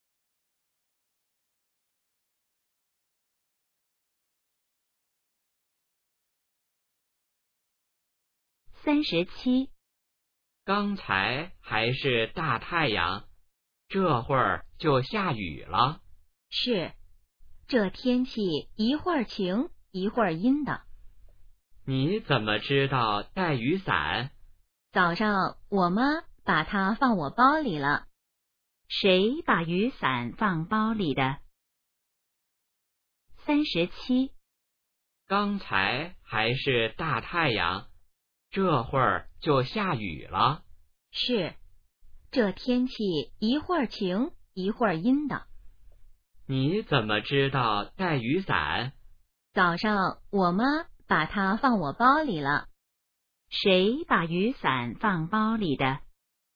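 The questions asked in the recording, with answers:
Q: 谁把雨伞放包里的?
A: 妈妈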